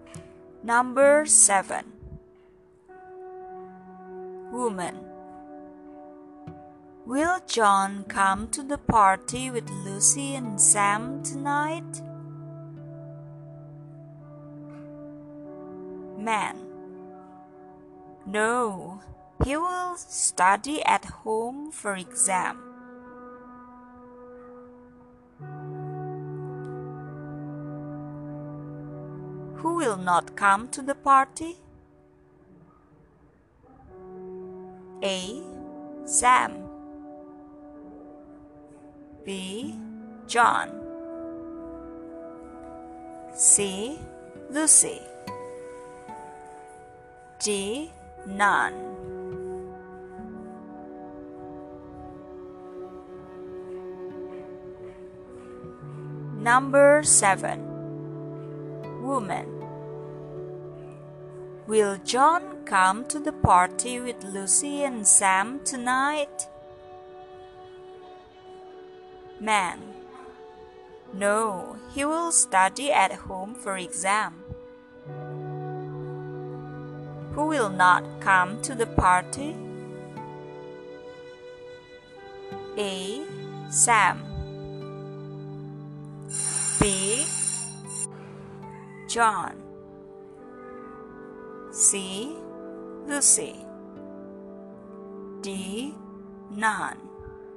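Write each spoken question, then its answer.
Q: Who will not come to the party?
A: B: John.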